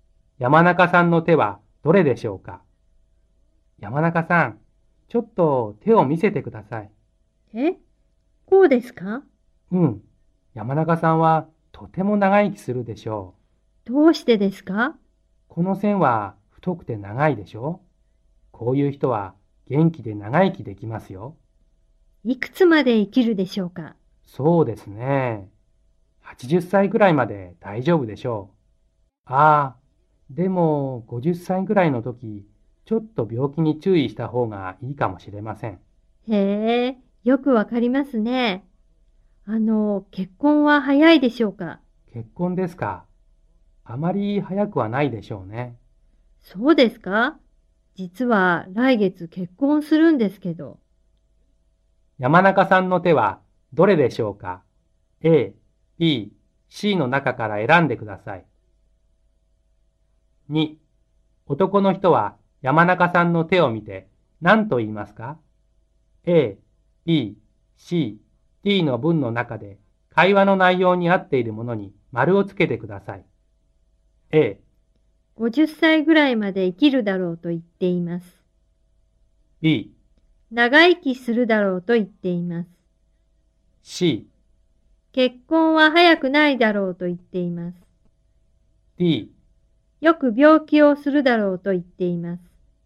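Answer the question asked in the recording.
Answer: B: 長生きするだろうと言っています。 / C: 結婚は早くないだろうと言っています。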